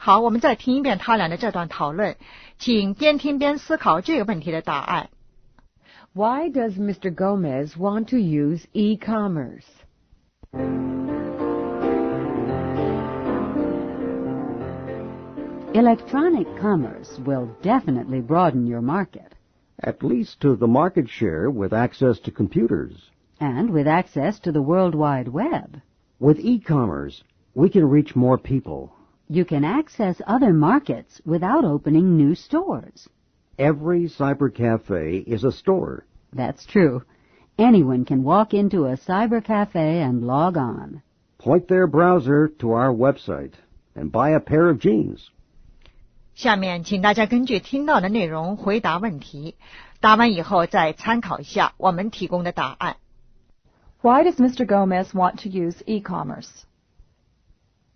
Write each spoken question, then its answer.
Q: Why does Mr. Gomez want to use e-commerce?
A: To broaden his market.